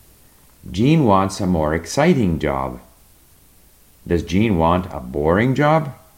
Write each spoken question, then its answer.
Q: Does Jean want a boring job?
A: No, Jean wants a more exciting job.